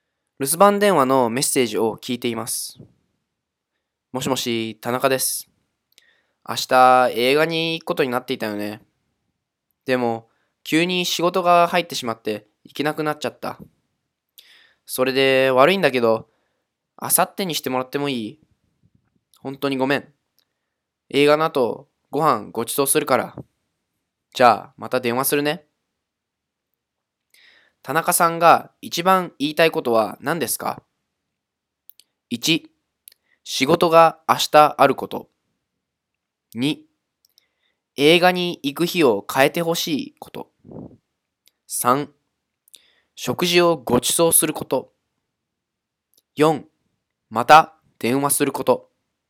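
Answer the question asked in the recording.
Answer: 2: 映画に行く日を変えてほしいこと。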